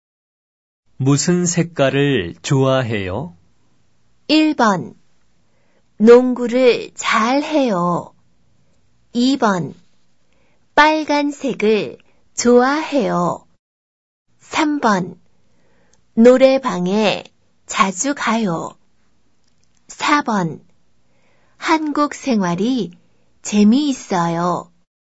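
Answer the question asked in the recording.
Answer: 2: 빨간색을 좋아해요.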